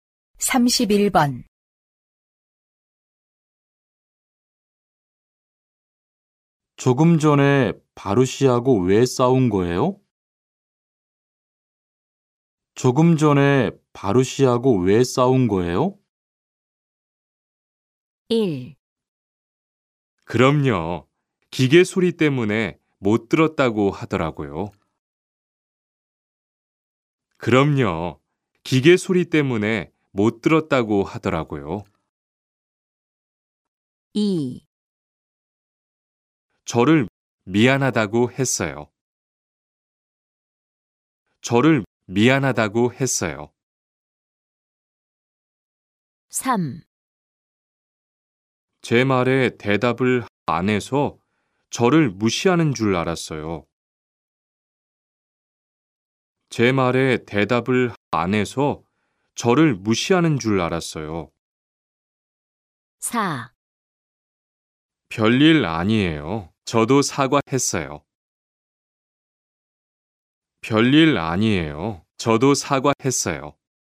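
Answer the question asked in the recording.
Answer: 3: 제 말에 대답을 안 해서 저를 무시하는 줄 알았어요.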